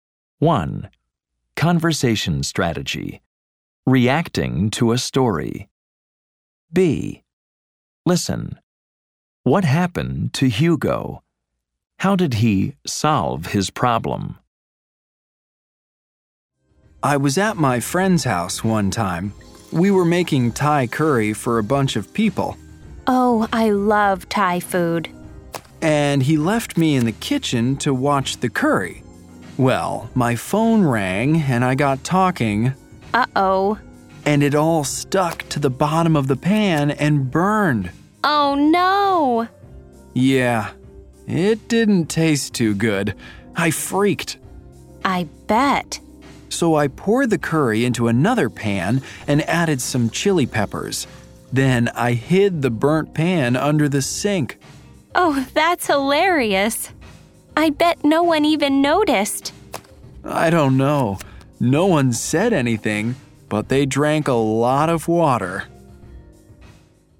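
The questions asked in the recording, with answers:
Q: What happened to Hugo?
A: He was talking on the phone and the curry burned.

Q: How did he solve his problem?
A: He poured the curry into another pan, added chili peppers, and hid the burnt pan under the sink.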